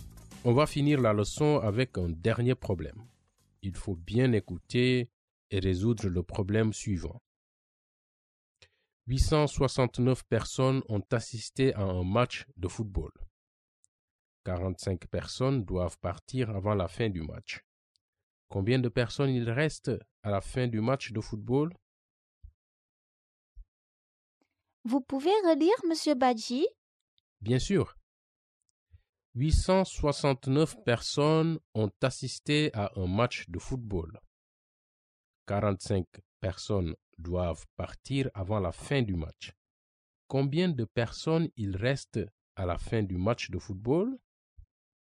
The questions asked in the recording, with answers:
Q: Combien de personnes il reste à la fin du match de football?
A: Donc, il y a 824 personnes à la fin du match de football.